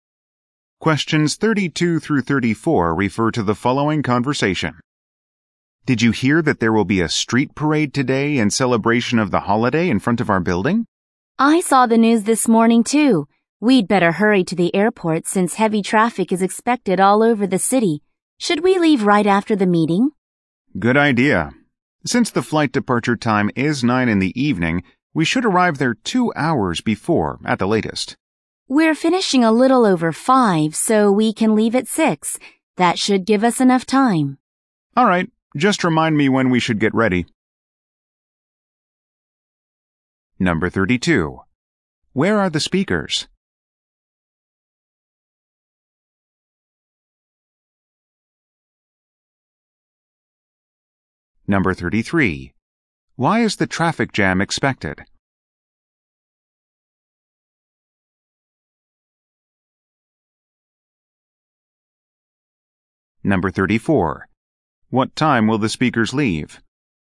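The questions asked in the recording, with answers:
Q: Why is the traffic jam expected?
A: Because of a holiday street parade

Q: What time will the speakers leave?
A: At 6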